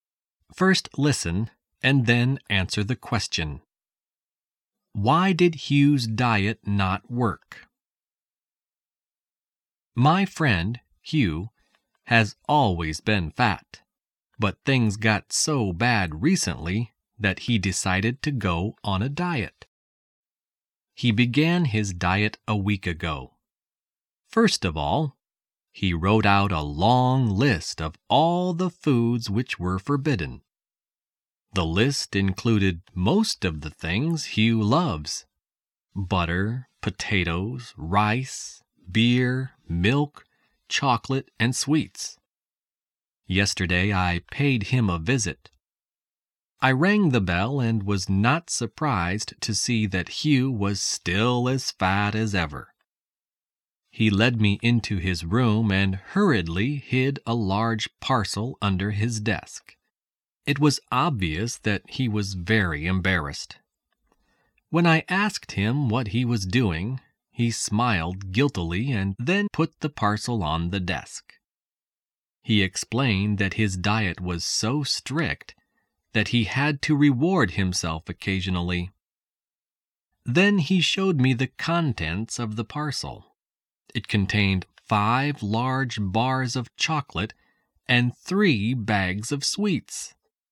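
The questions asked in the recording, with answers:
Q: Why did Hugh's diet not work?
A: He kept rewarding himself with chocolate and sweets.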